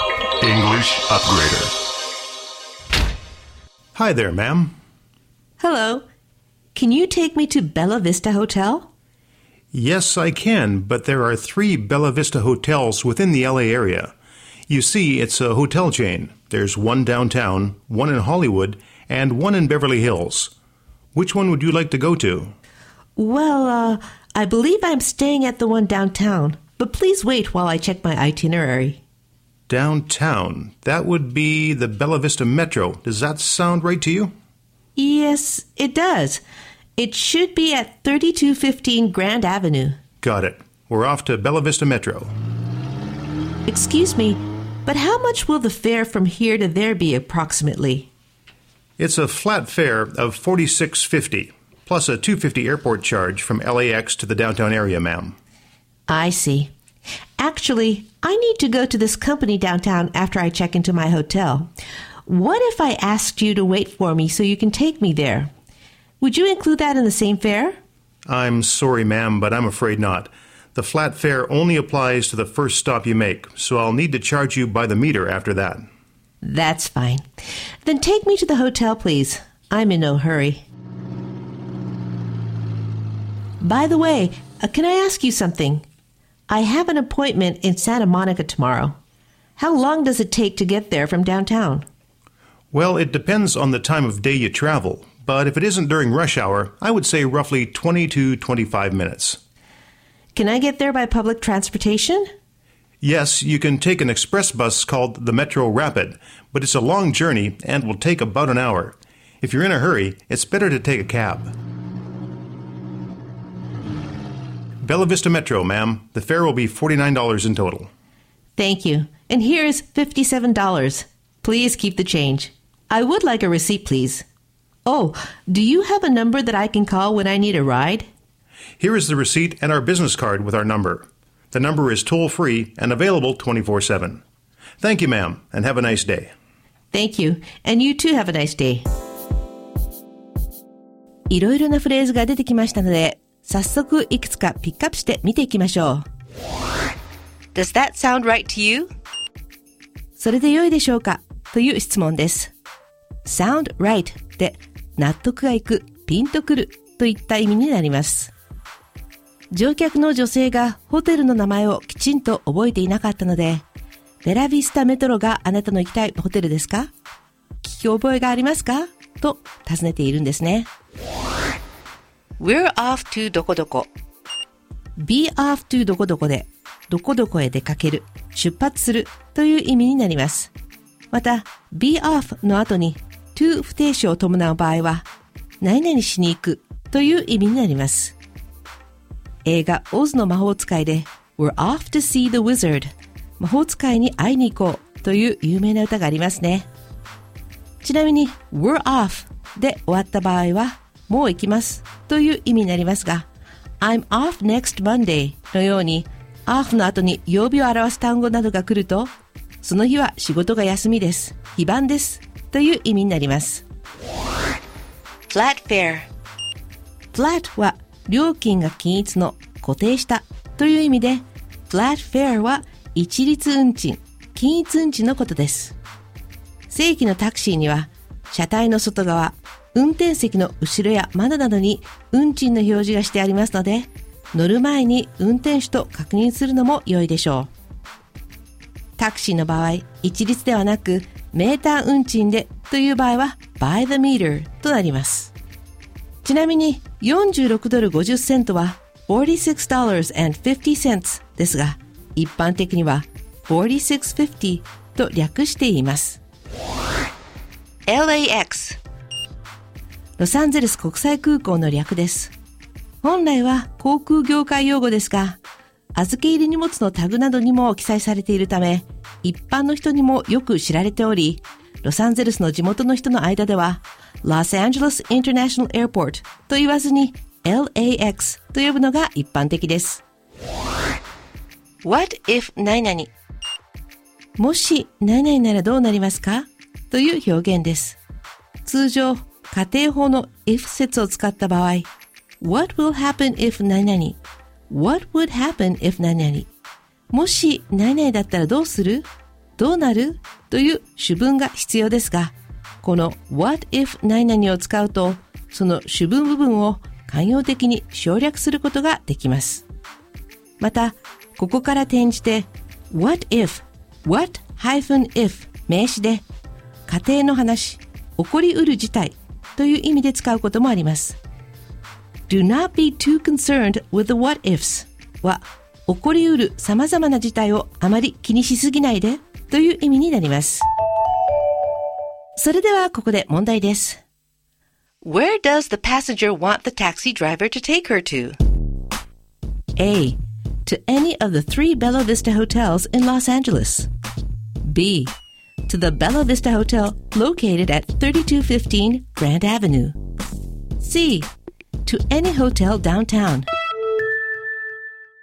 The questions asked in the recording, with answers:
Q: Where does the passenger want the taxi driver to take her to?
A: 正解は B です